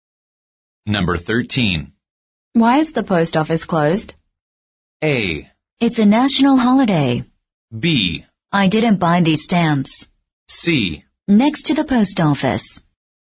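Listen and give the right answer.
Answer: A: It's a national holiday.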